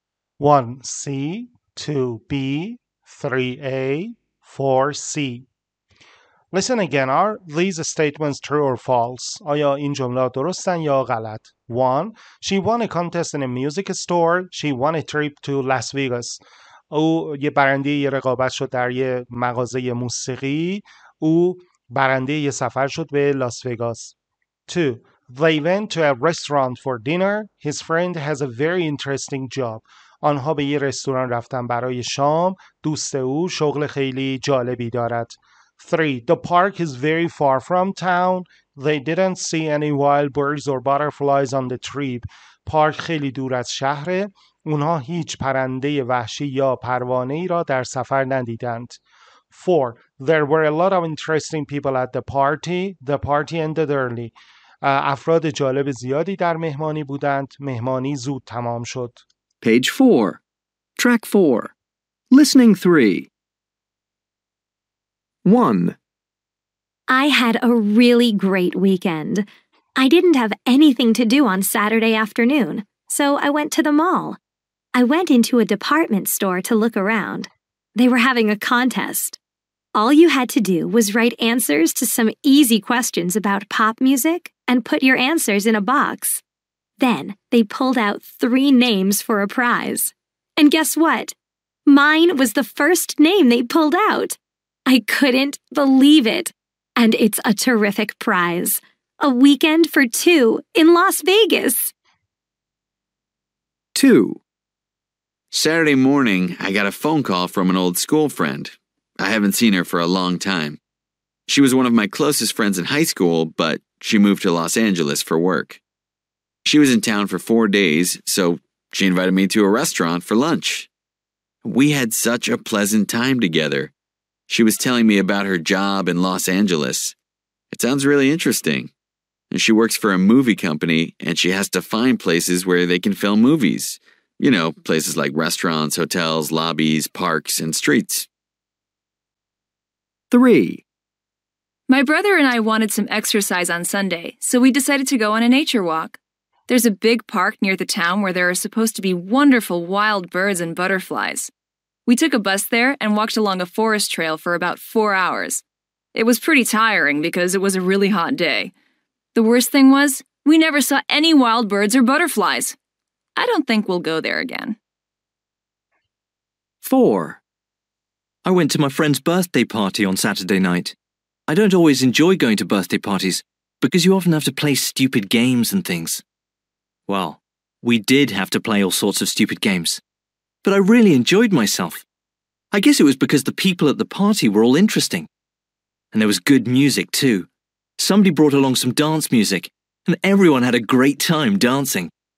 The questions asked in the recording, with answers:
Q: She won a contest in a music store.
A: One, false

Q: She won a trip to Las Vegas.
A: true

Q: They went to a restaurant for dinner.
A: Two, false

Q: His friend has a very interesting job.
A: true

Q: The park is very far from town.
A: Three, false

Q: They didn't see any wild birds or butterflies on the trip.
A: true

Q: There were a lot of interesting people at the party.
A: Four, true